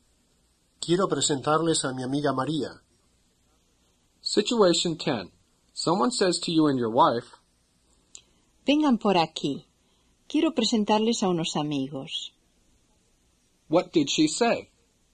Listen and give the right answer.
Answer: She said, come this way. I want to introduce some friends to you.